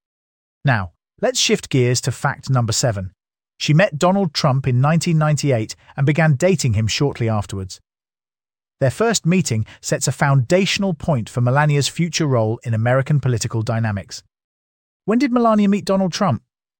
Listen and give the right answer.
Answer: Correct answer, 1998.